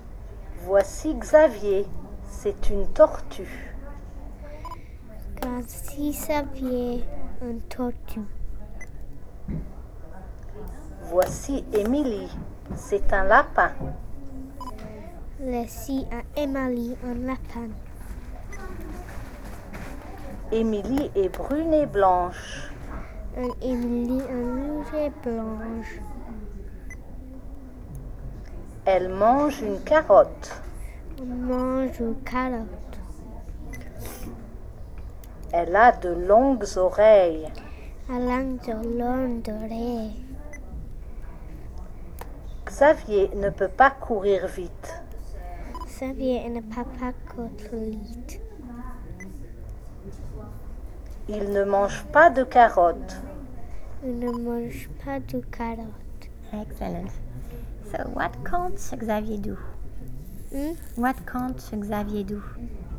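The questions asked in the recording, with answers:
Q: What can't Xavier do?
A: He can't run fast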